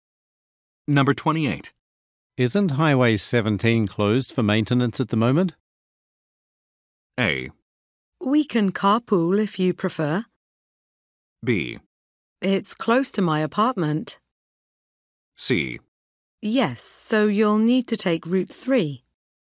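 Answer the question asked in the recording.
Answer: C: Yes, so you'll need to take Route 3.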